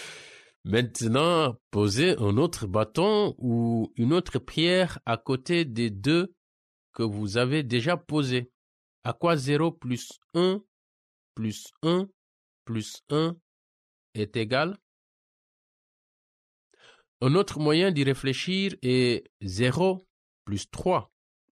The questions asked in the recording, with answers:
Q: À quoi 0 plus 1 plus 1 plus 1 est égal?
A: Égale 3.